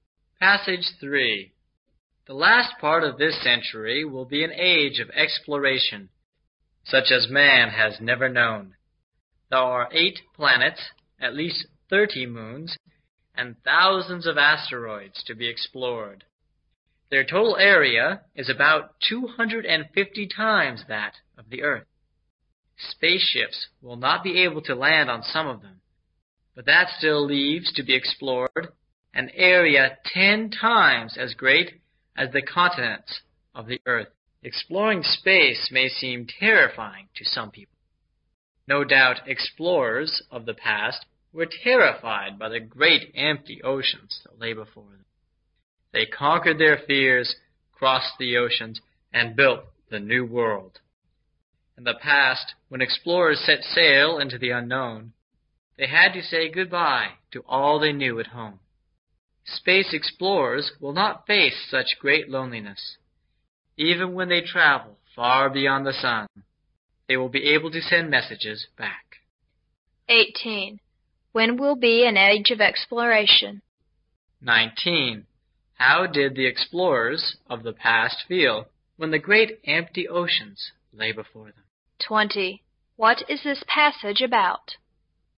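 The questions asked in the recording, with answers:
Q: When will be an age of exploration?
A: The last part of this century

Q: How did the explorers of the past feel when the great empty oceans lay before them?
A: Terrified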